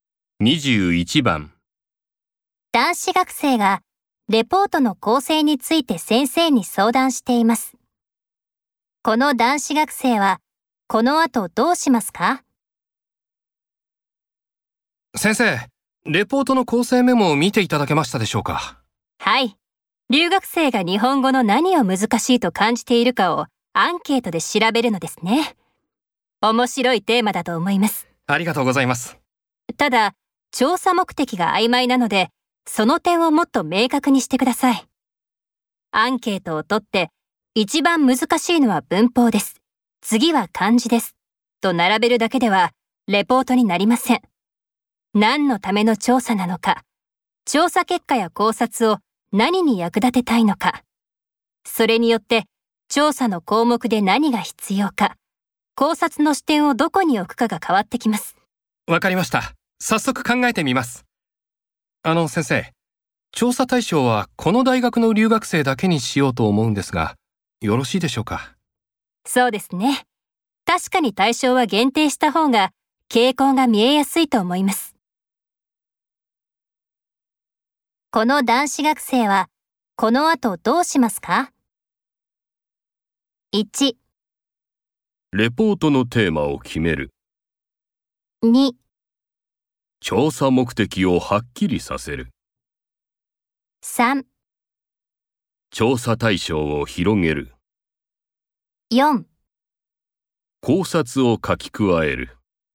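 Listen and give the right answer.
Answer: 2: 調査目的をはっきりさせる。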